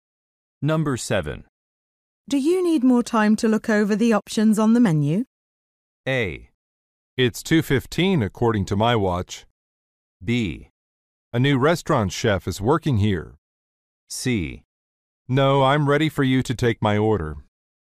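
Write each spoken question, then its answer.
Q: Do you need more time to look over the options on the menu?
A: C: No, I'm ready for you to take my order.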